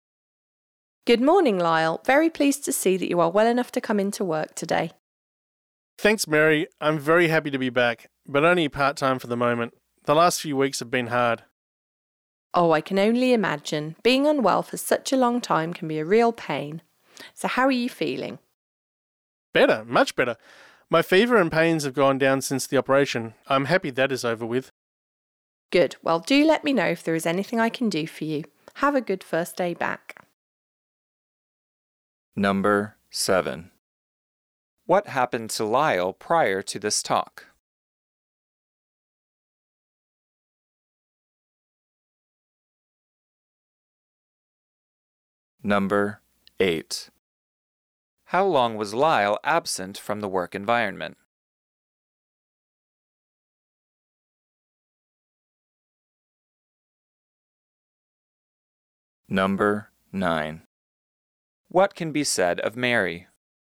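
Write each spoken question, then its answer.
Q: What happened to Lyle prior to this talk?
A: He was ill and had an operation

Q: How long was Lyle absent from the work environment?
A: A few weeks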